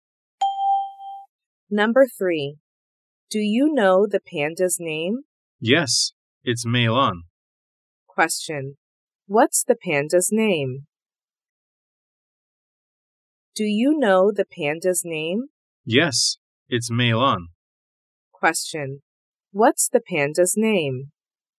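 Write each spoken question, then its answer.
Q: Question, what's the panda's name?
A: Mei Lan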